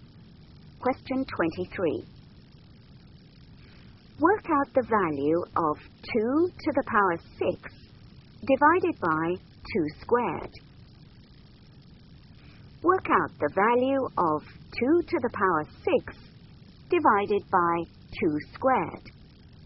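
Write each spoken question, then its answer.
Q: Work out the value of 2 to the power 6 divided by 2 squared.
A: 16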